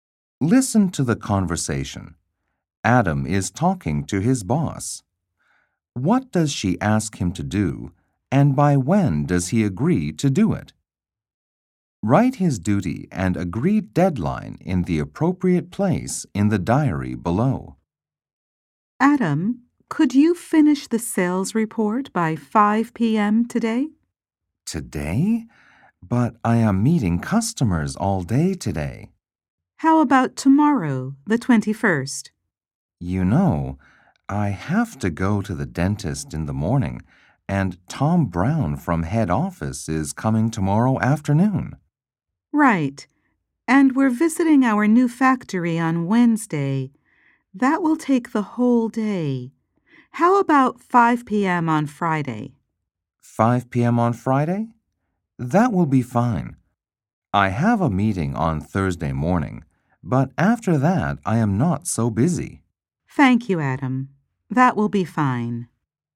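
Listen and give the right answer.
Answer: Finish the sales report, by 5 p.m. on Friday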